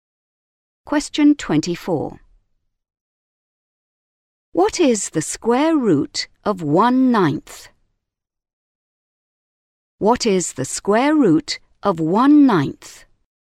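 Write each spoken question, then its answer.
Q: What is the square root of 1/9?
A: 1/3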